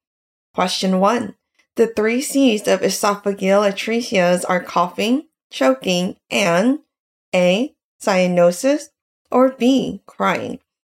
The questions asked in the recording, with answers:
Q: The three C's of esophageal atresias are coughing, choking, and A, cyanosis, or B, crying.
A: The correct answer is A, cyanosis.